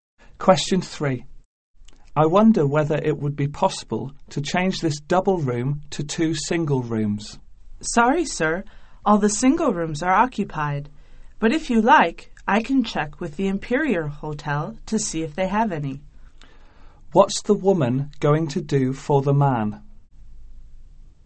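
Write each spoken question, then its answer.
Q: What's the woman going to do for the man?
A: Check if the Imperial Hotel has single rooms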